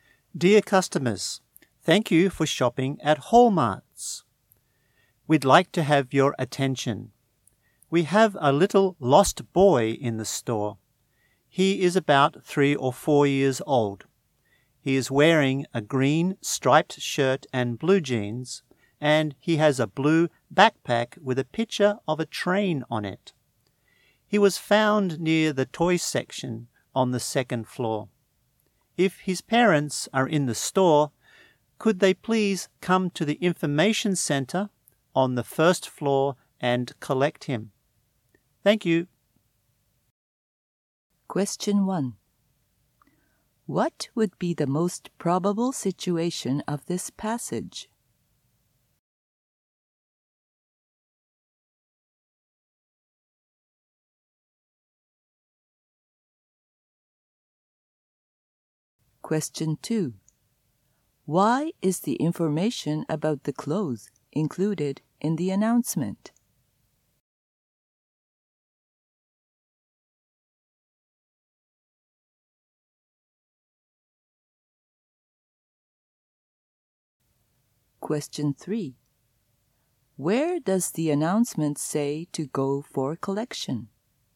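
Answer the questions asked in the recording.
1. A store announcement about a lost boy
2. To help his parents identify the boy
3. The information center on the first floor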